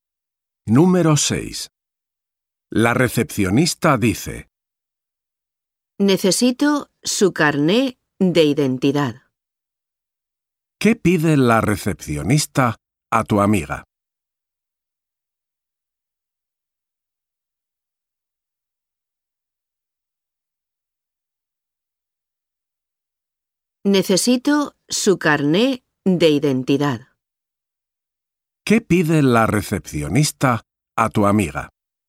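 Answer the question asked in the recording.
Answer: su carné de identidad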